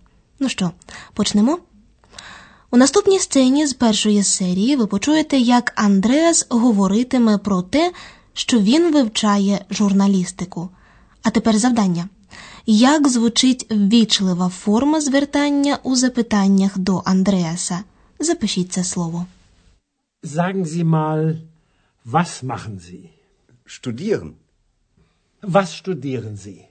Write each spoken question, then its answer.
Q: як звучить ввічлива форма звертання у запитаннях до Андреаса?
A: Вона звучить так: зі, тобто ви.